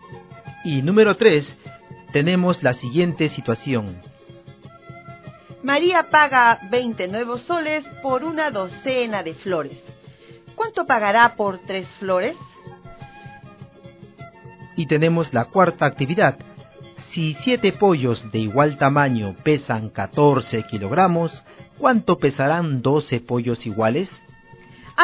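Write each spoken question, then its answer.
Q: María paga 20 nuevos soles por una docena de flores. ¿Cuánto pagará por 3 flores?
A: 5 nuevos soles

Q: Si 7 pollos de igual tamaño pesan 14 kilogramos, ¿cuánto pesarán 12 pollos iguales?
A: 24 kilogramos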